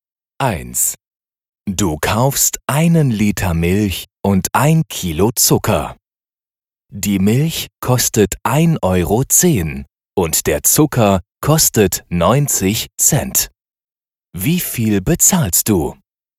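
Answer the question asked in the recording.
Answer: 2 Euro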